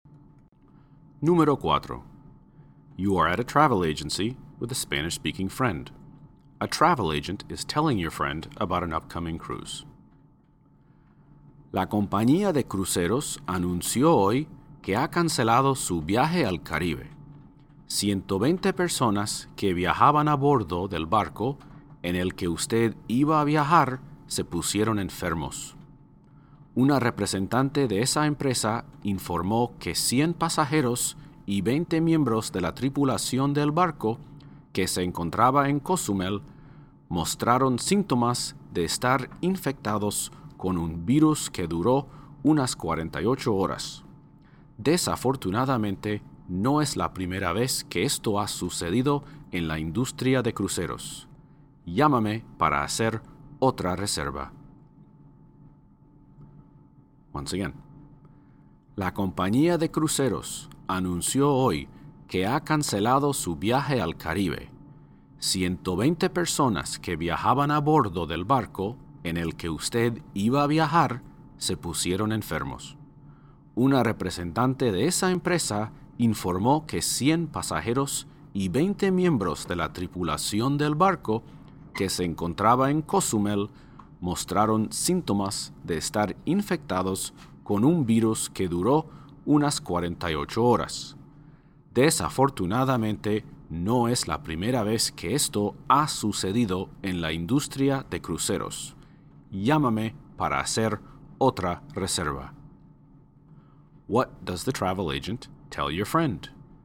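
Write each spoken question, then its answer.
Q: What does the travel agent tell your friend?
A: The cruise to the Caribbean was cancelled because passengers and crew got sick with a virus.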